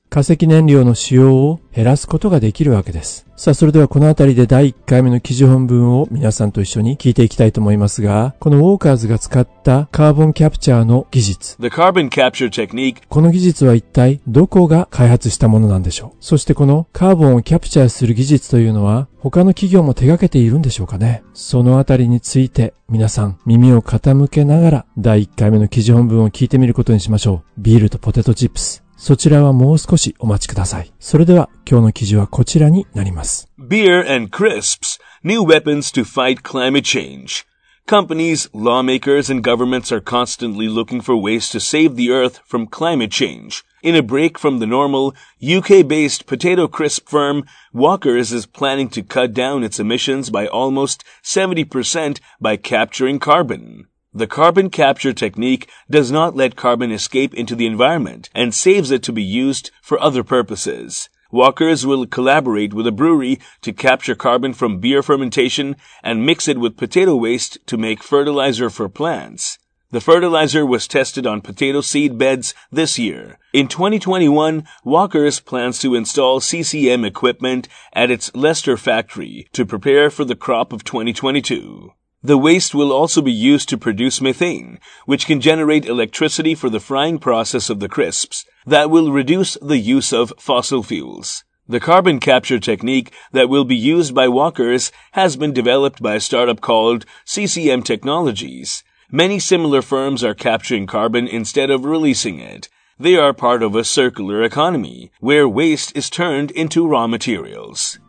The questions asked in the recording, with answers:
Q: この技術は一体どこが開発したものなんでしょう。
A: その企業の名前は CCM Technology

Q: そしてこのカーボンをキャプチャーする技術というのは他の企業も手掛けているんでしょうかね。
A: Many similar firms, CCM Technologies と似たような会社が capturing carbon, カーボンを回収して instead of releasing it, リリースする代わりにカーボンを回収している同じような企業がたくさんあるようですね。